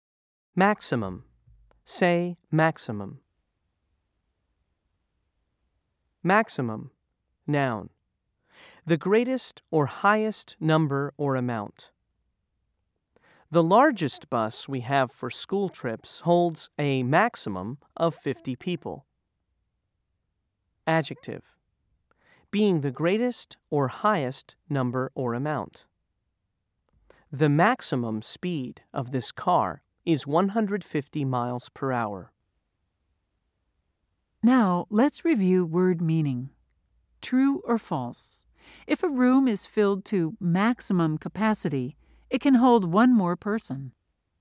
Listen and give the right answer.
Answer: If you said false, you're right.